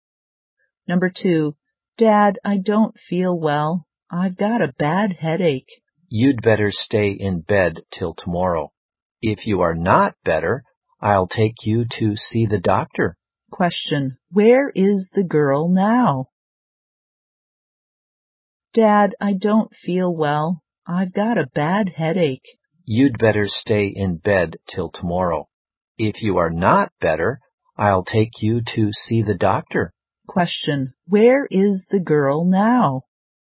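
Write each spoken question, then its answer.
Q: Question, where is the girl now?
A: At home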